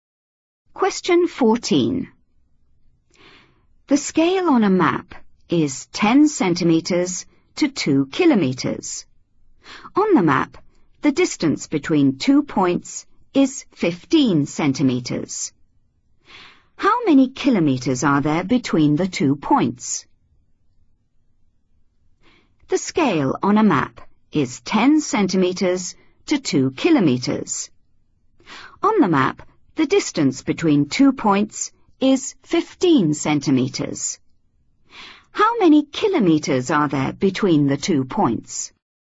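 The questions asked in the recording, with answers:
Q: How many kilometers are there between the two points?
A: 3 km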